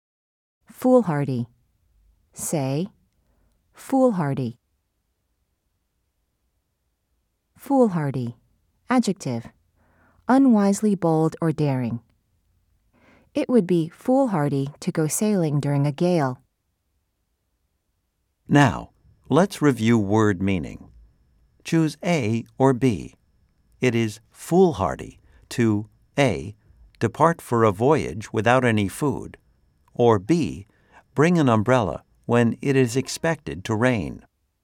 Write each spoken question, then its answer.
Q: Choose A or B. It is foolhardy to A, depart for a voyage without any food, or B, bring an umbrella when it is expected to rain.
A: If you said A, you are correct.